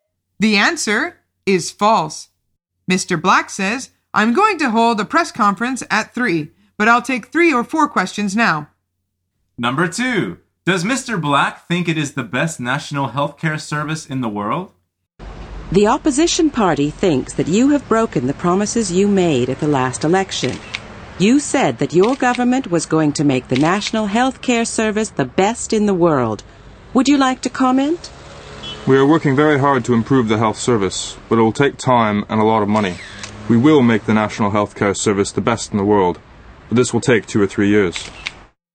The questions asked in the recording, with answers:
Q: Does Mr. Black think it is the best national health care service in the world?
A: The answer is no, not at the moment.